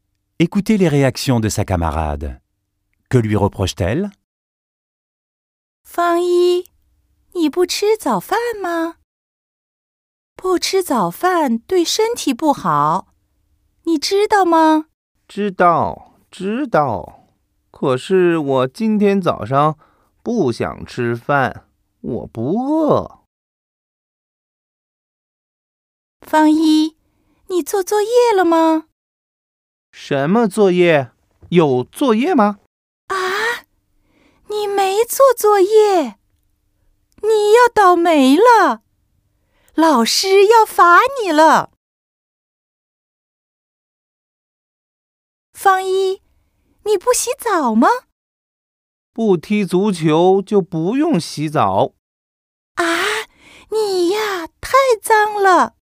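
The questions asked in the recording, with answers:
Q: Que lui reproche-t-elle?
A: De ne pas prendre son petit déjeuner, de ne pas avoir fait ses devoirs et de ne pas se laver (il est trop sale).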